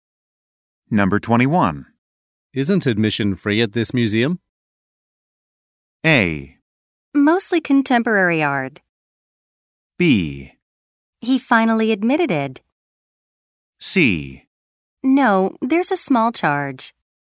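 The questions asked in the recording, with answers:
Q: Isn't admission free at this museum?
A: C: No, there's a small charge.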